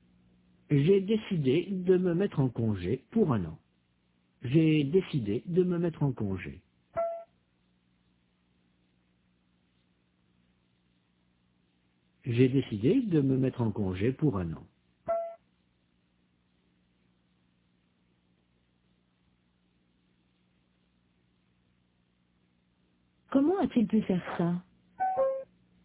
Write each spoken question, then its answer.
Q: Comment a-t-il pu faire ça?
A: Il s'est mis en congé pour 1 an.